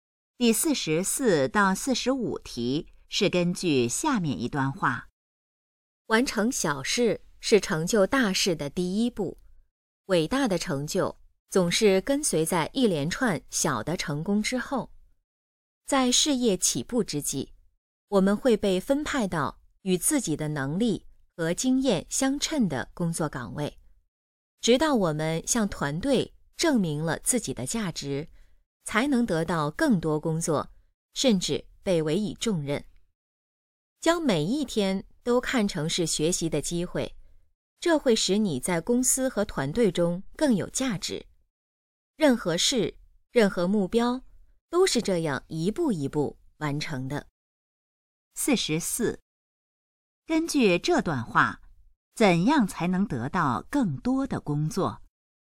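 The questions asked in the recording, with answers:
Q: 根据这段话,怎样才能得到更多的工作?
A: 向团队证明自己的价值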